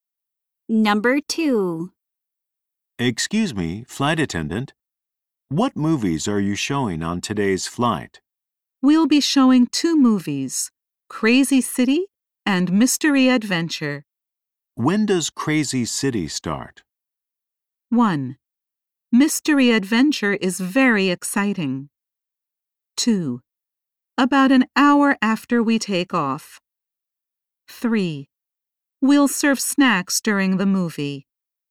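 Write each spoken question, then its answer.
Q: When does Crazy City start?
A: 2: About an hour after we take off.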